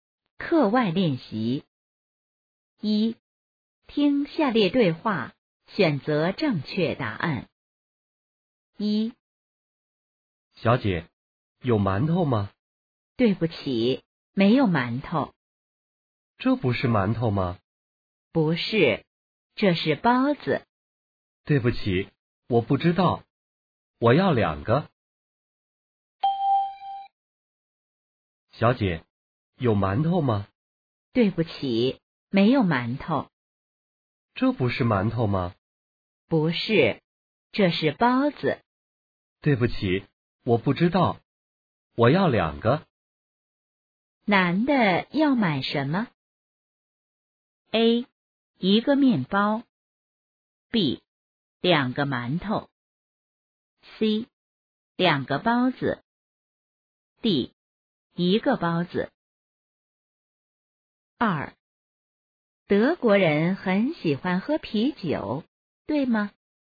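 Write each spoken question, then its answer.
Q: 男的要买什么?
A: C: 两个包子。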